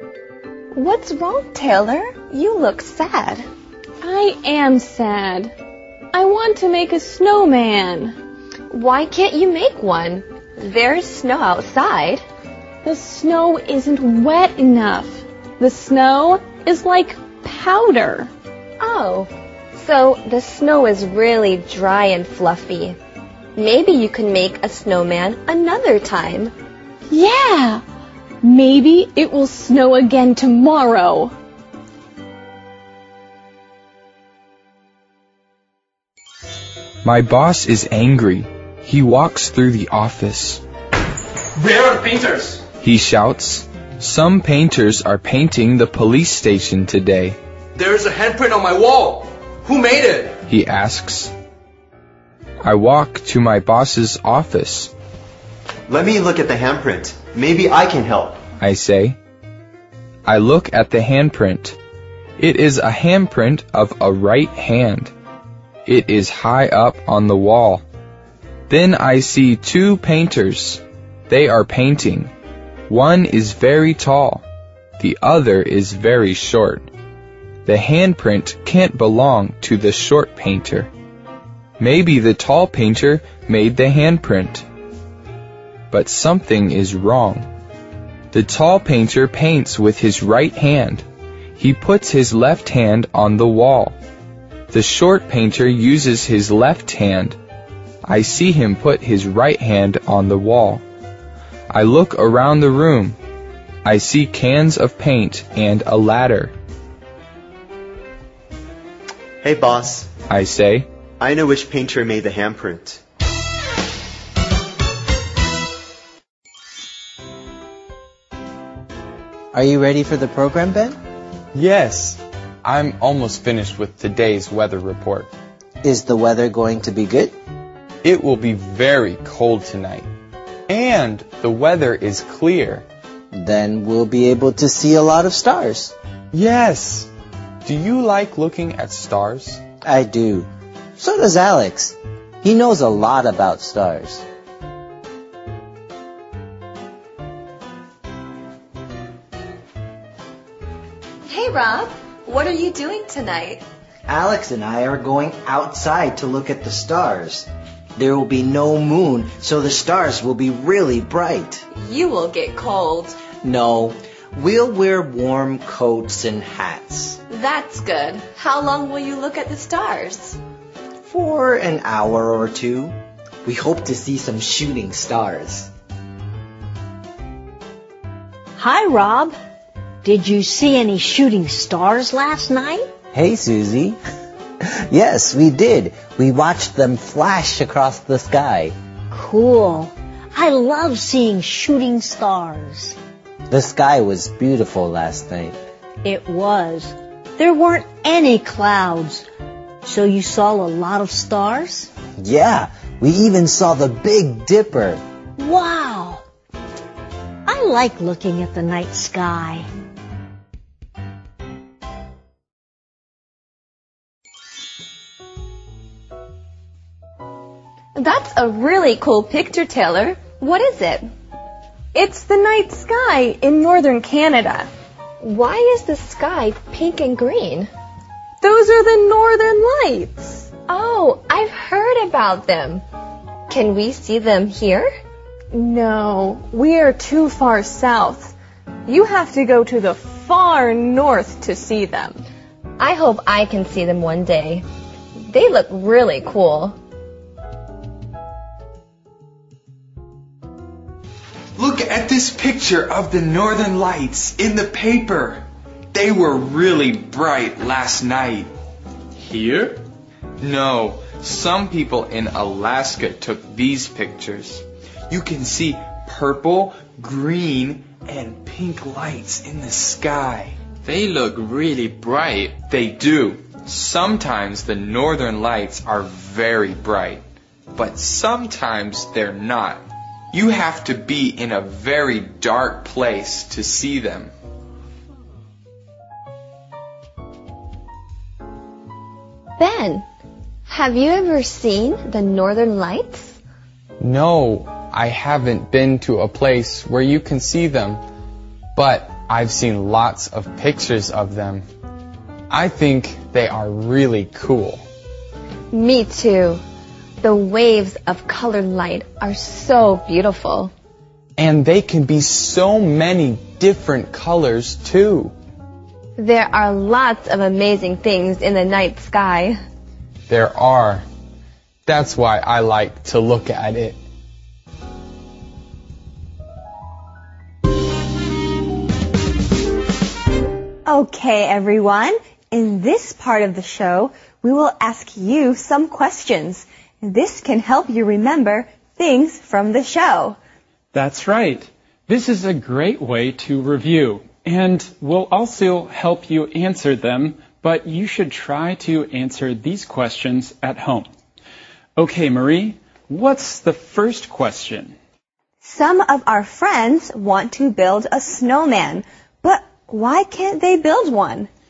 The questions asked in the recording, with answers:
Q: Some of our friends want to build a snowman, but why can't they build one?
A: There is snow, but the snow is too dry.